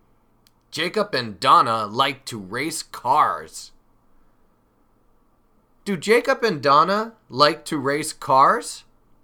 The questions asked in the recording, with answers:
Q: Do Jacob and Donna like to race cars?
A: Yes. Yes, they do. Jacob and Donna like to race cars.